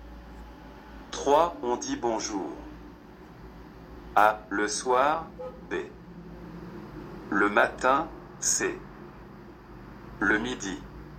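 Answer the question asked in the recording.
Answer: B: Le matin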